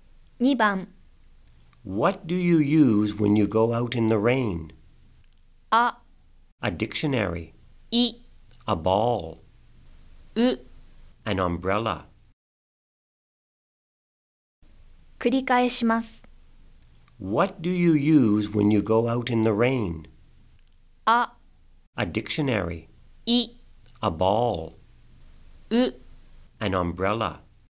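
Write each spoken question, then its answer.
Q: What do you use when you go out in the rain?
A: う: An umbrella.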